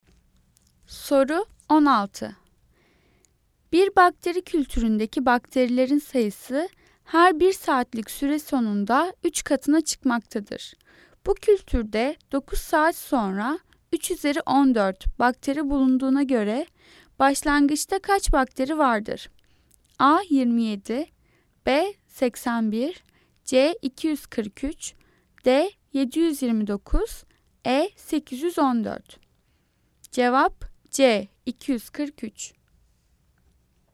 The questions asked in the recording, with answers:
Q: Bu kültürde 9 saat sonra 3 üzeri 14 bakteri bulunduğuna göre başlangıçta kaç bakteri vardır?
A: Cevap C 243.